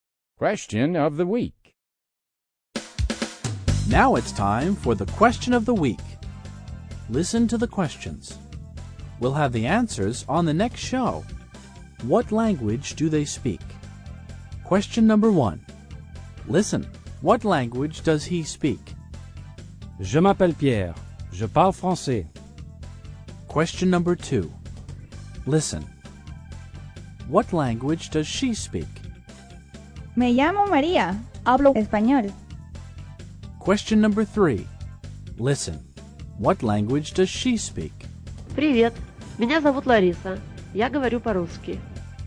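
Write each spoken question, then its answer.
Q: what language does he speak?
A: French

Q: What language does she speak?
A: Spanish

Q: What language does she speak?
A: Russian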